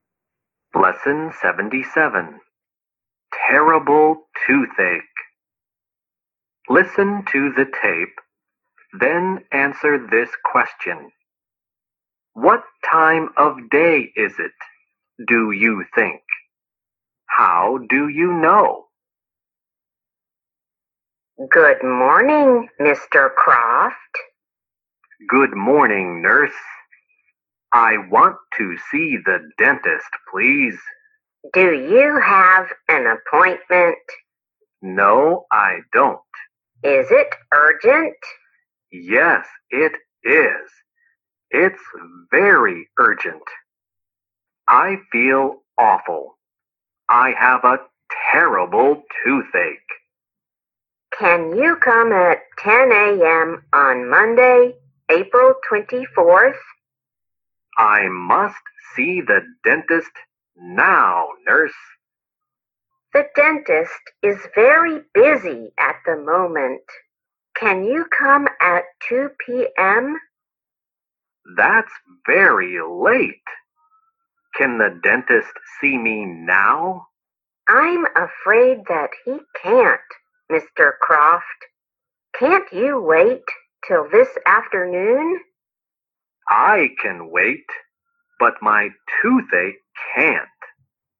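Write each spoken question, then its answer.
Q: What time of day is it, do you think?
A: It's morning (they say 'Good morning').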